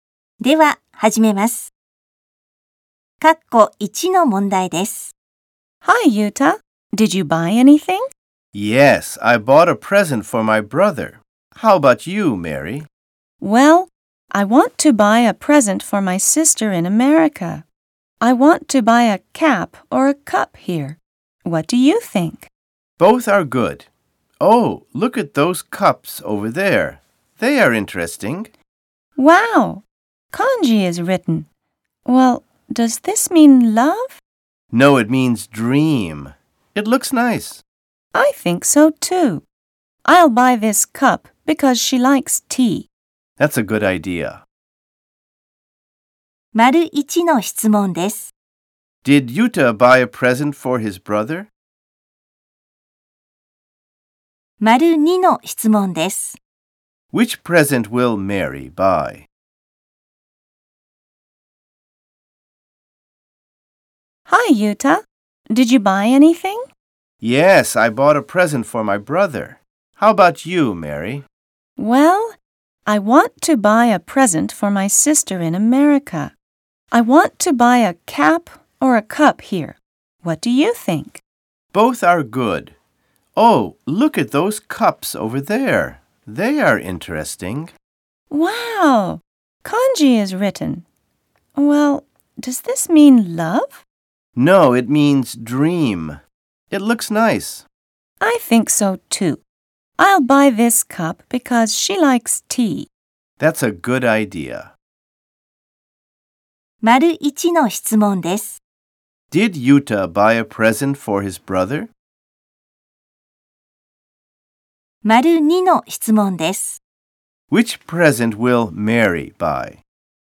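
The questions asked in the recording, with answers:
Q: Did Yuta buy a present for his brother?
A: Yes, he did.

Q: Which present will Mary buy?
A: A cup with the kanji for 'dream' on it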